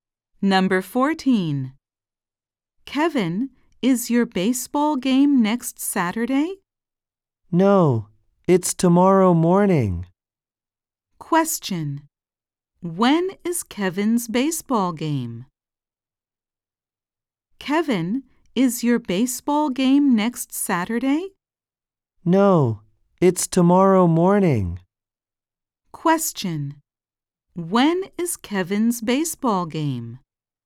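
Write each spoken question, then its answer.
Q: When is Kevin's baseball game?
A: Tomorrow morning.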